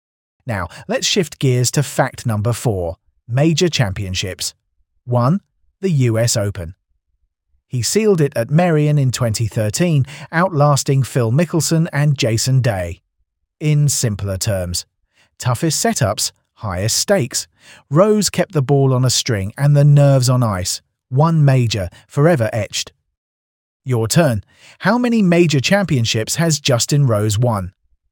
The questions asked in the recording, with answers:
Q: How many major championships has Justin Rose won?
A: Correct answer. 1.